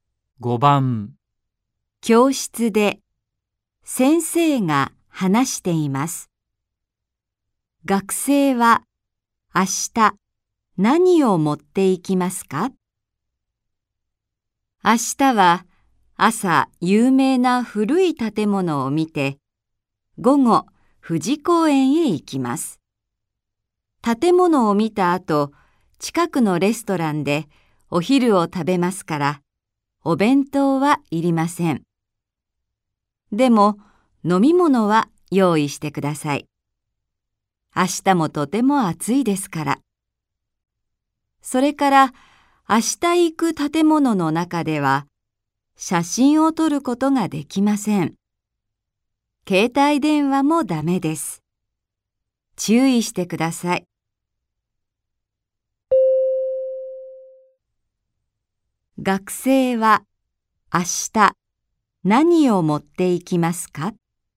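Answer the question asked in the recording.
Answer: 飲み物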